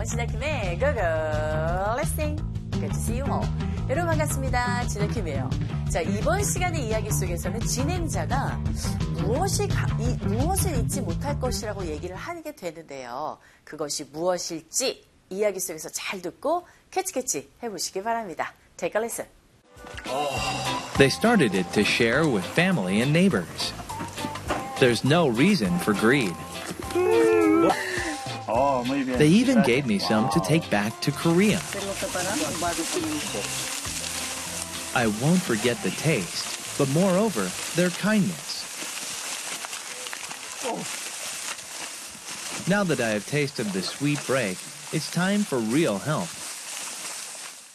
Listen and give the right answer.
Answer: 맛도 맛이지만 그들의 친절함을 잊지 못할 것이라고 합니다.